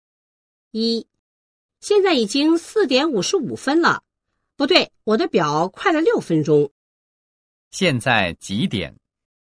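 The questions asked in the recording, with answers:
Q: 现在几点?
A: 4:49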